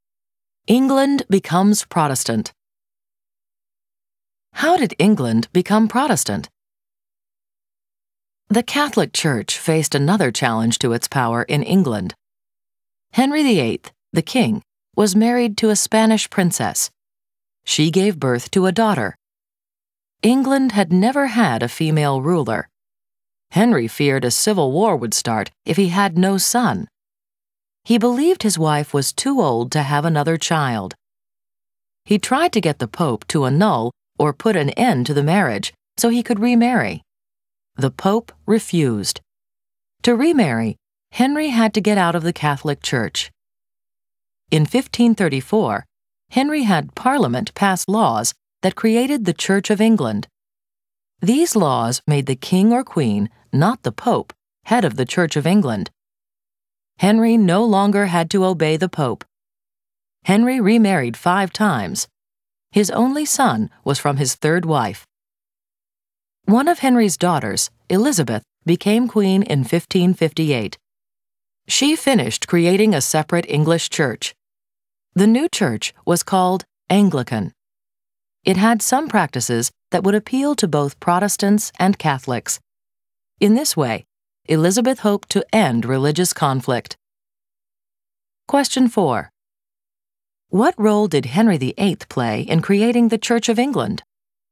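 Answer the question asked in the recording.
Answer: He had Parliament create the Church of England with the king as its head so he could remarry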